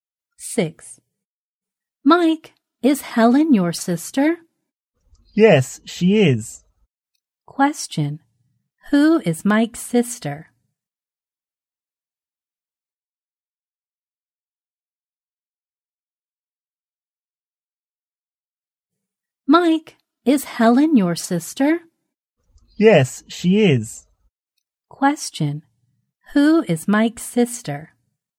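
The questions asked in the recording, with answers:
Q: Who is Mike's sister?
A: Helen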